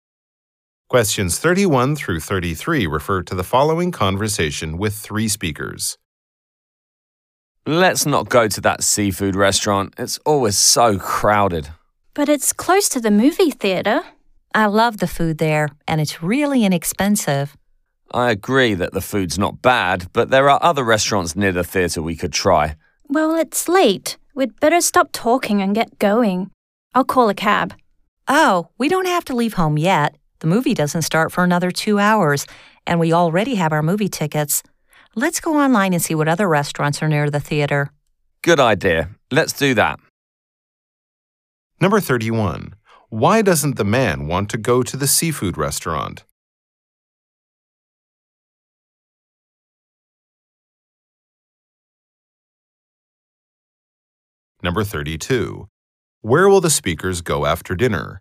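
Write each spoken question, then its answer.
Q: Why doesn't the man want to go to the seafood restaurant?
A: It's always crowded

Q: Where will the speakers go after dinner?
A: To the movie theater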